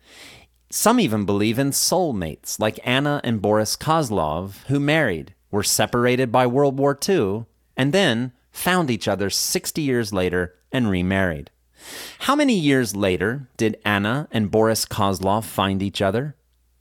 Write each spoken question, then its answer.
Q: How many years later did Anna and Boris Kozlov find each other?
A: They found each other 60 years later.